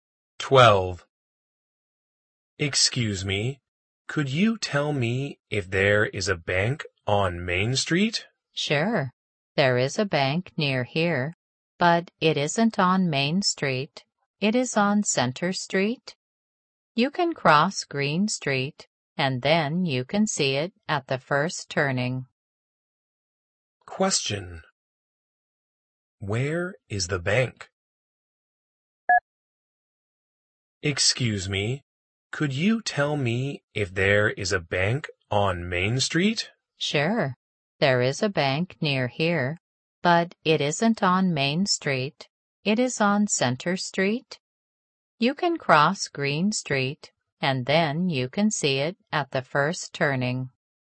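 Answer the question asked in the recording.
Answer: On Center Street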